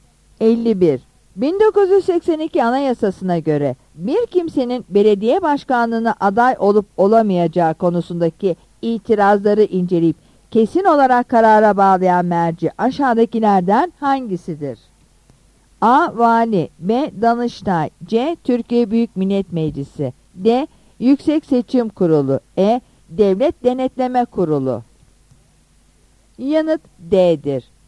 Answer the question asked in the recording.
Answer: Yanıt D'dir.